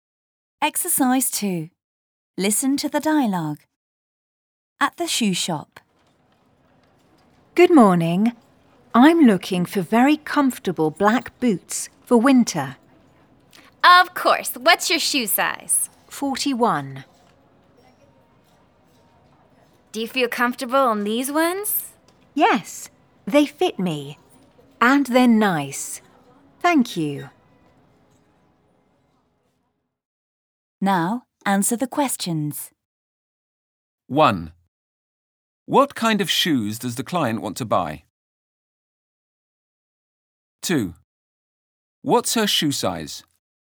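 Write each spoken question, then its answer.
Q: What kind of shoes does the client want to buy?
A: Very comfortable black boots for winter

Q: What's her shoe size?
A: 41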